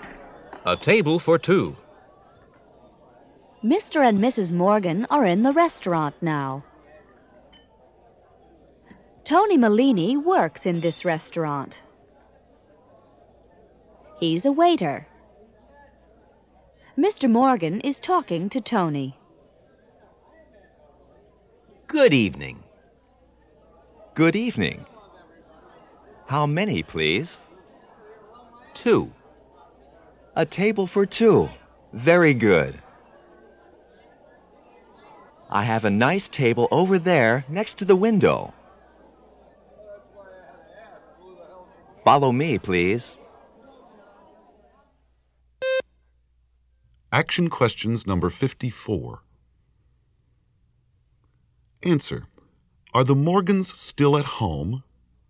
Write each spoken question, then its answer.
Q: Are the Morgans still at home?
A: No, they're not.